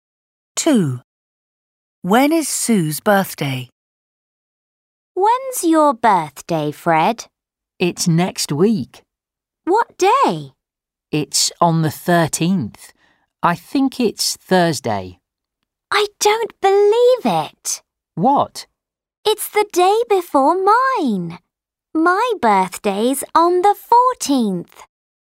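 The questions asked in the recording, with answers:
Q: When is Sue's birthday?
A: the 14th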